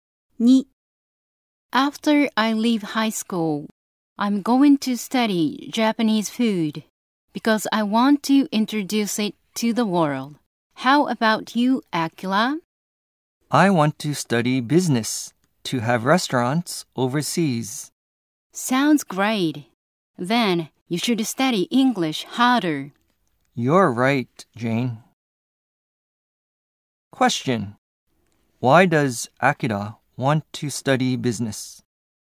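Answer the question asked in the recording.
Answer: To have restaurants overseas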